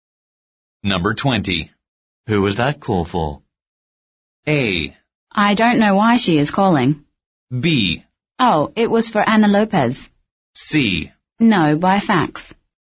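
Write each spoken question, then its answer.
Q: Who was that call for?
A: B: Oh, it was for Ana Lopez.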